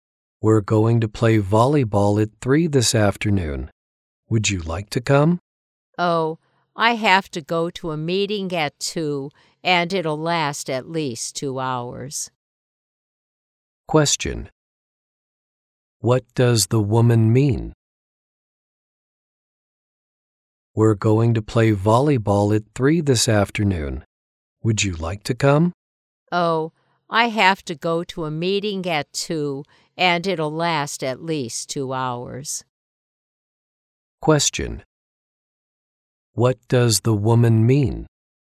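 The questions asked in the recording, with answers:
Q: What does the woman mean?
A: She can't play volleyball with them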